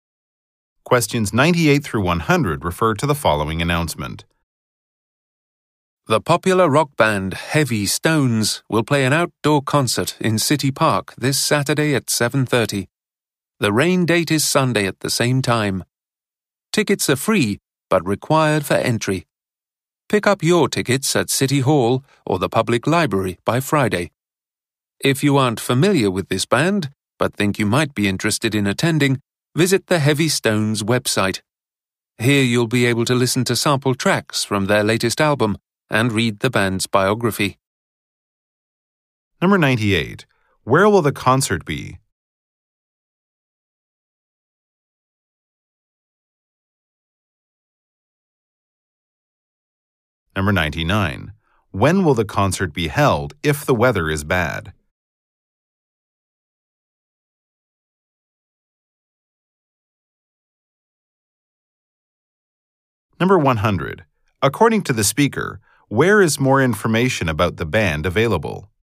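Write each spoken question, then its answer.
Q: Where will the concert be?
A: In City Park

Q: When will the concert be held if the weather is bad?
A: Sunday at 7:30

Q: According to the speaker, where is more information about the band available?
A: On the Heavy Stones website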